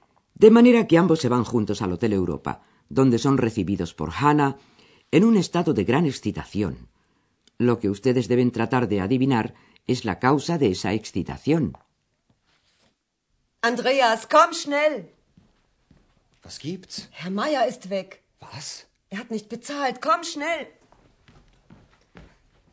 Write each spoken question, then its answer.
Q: Lo que ustedes deben tratar de adivinar es la causa de esa excitación.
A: Y es que el señor Meier se ha ido.